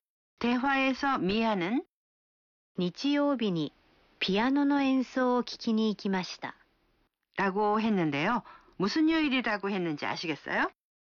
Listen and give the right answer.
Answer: 일요일이요。